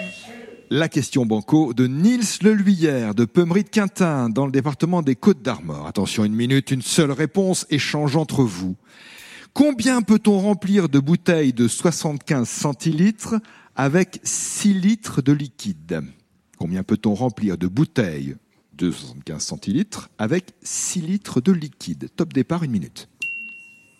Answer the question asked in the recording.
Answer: Bonne réponse, c'est 8.